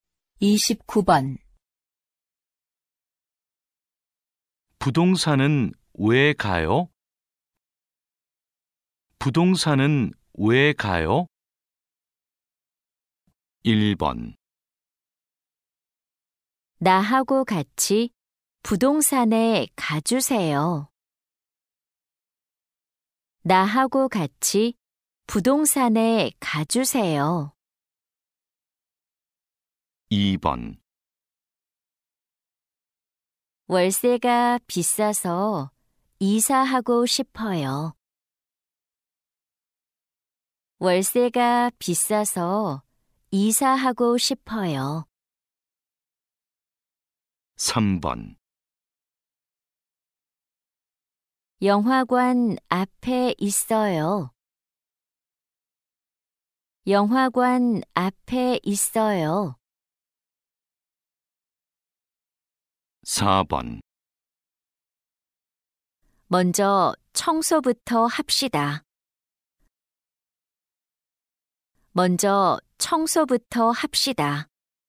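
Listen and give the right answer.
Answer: 2: 월세가 비싸서 이사하고 싶어요.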